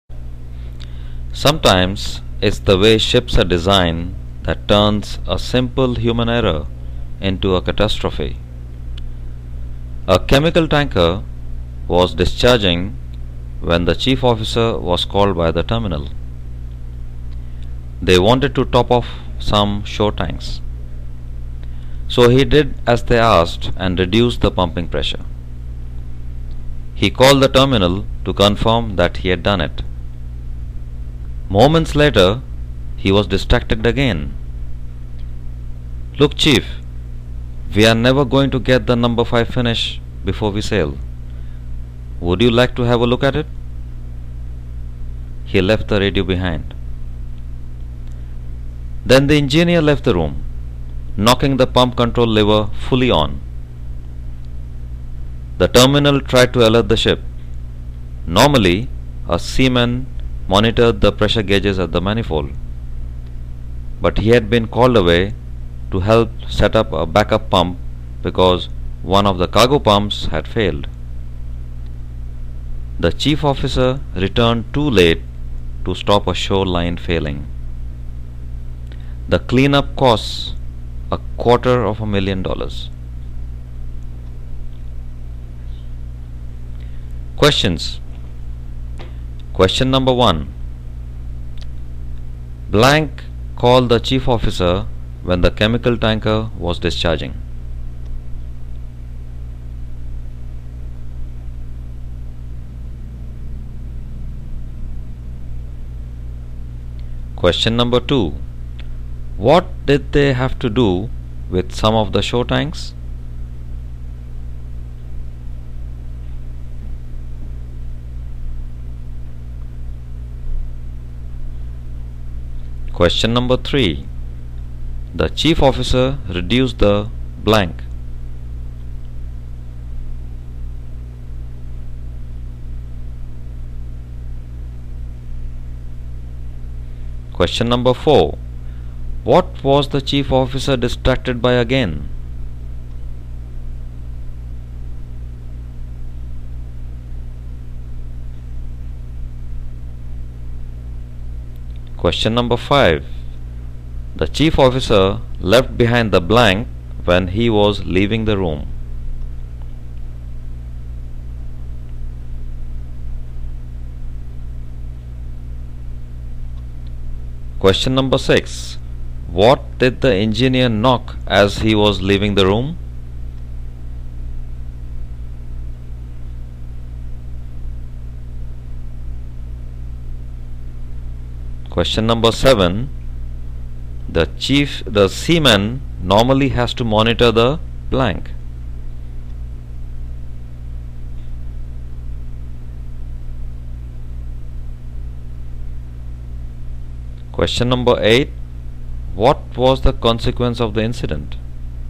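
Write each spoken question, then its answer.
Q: Blank called the chief officer when the chemical tanker was discharging.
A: The terminal

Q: What did they have to do with some of the shore tanks?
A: Top them off

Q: The chief officer reduced the blank.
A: pumping pressure

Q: The chief officer left behind the blank when he was leaving the room.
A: radio

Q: What did the engineer knock as he was leaving the room?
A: The pump control lever

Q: The seaman normally has to monitor the blank.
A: pressure gauges at the manifold

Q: What was the consequence of the incident?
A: A shoreline failed; cleanup cost $250,000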